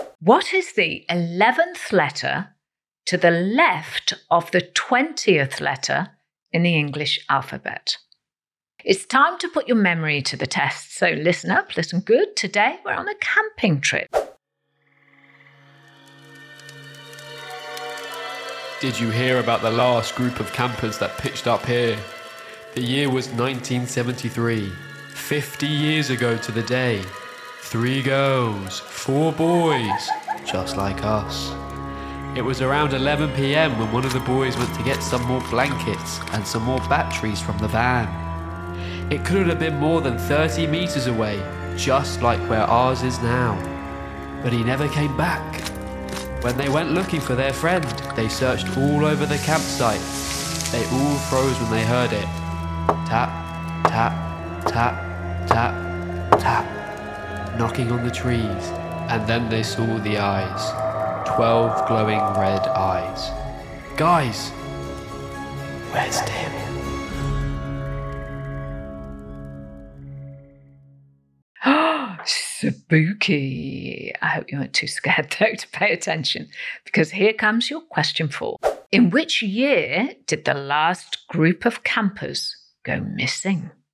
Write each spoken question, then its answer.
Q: In which year did the last group of campers go missing?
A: Well, it was 50 years to the day, 1973.